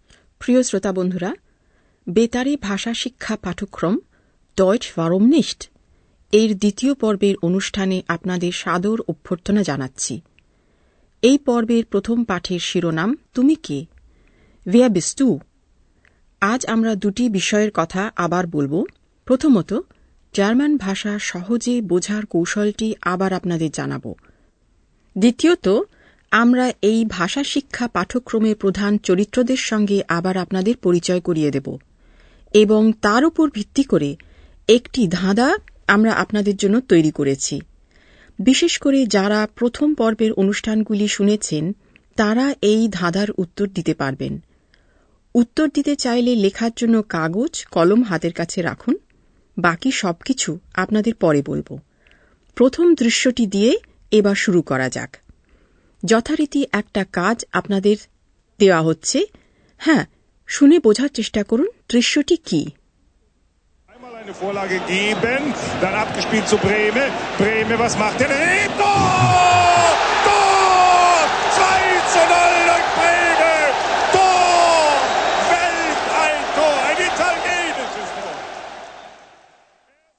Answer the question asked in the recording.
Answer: দৃশ্যটি ছিল football খেলার ধারা বিবরণের